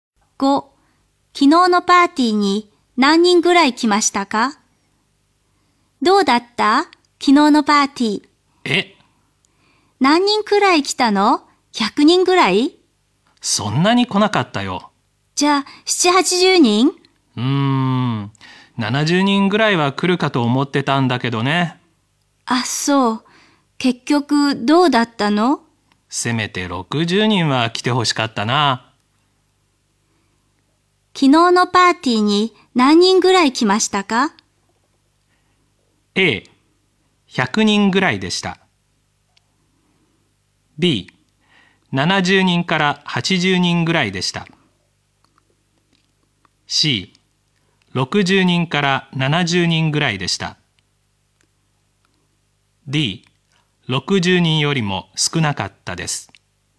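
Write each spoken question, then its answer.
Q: 昨日のパーティーに何人ぐらい来ましたか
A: D: 60人よりも少なかったです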